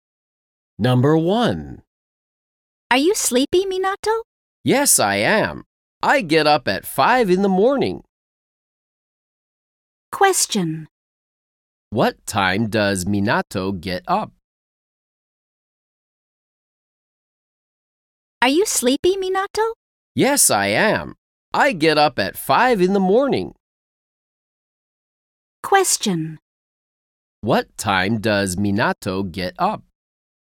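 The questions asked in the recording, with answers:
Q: What time does Minato get up?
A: At 5 in the morning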